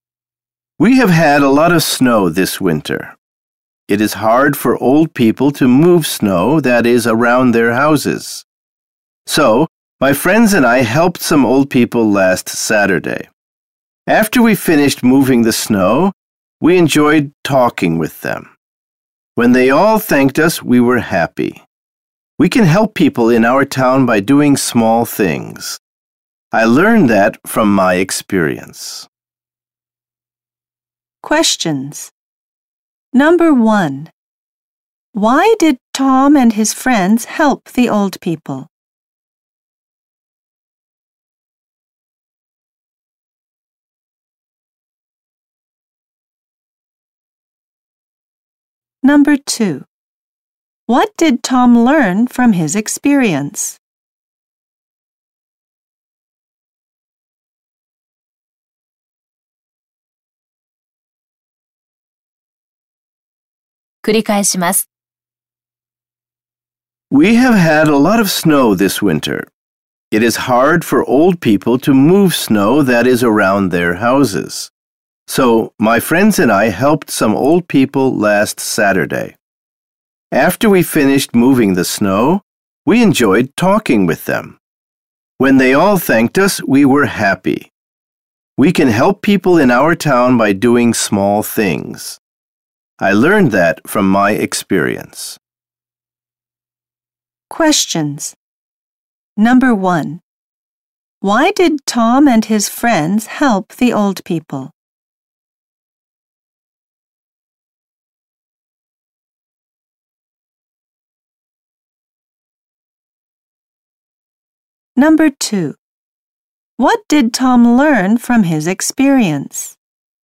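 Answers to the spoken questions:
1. Because it is hard for old people to move the snow around their houses.
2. They can help people in their town by doing small things.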